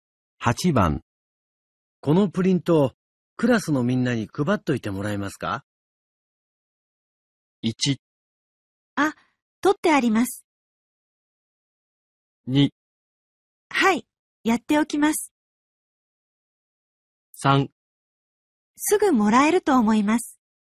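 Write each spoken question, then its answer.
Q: このプリント、クラスのみんなに配っといてもらえますか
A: 2: はい、やっておきます。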